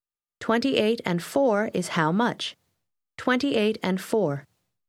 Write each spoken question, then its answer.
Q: 28 and 4 is how much? 28 and 4.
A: 32.